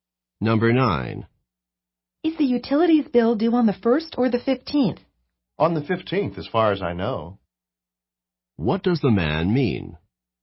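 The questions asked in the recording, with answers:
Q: What does the man mean?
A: He believes the bill is due on the 15th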